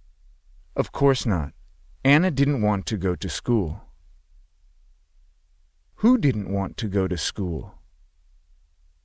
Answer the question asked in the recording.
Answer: Anna.